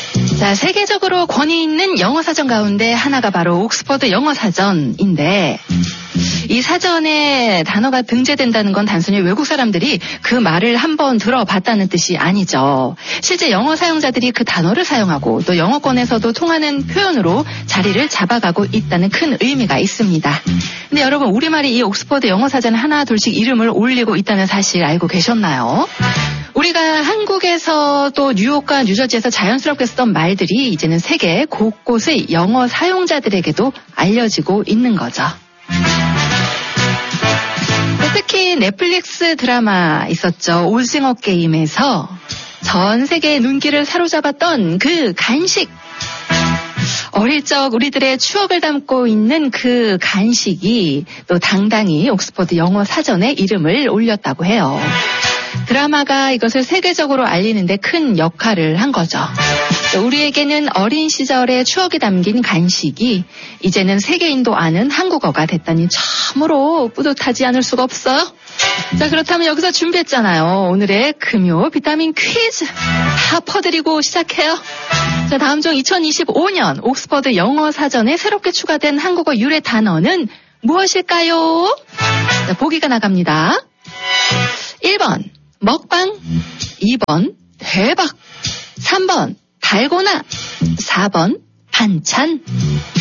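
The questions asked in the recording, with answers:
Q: 자, 다음 중 2025년 옥스퍼드 영어 사전에 새롭게 추가된 한국어 유래 단어는 무엇일까요?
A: 3: 달고나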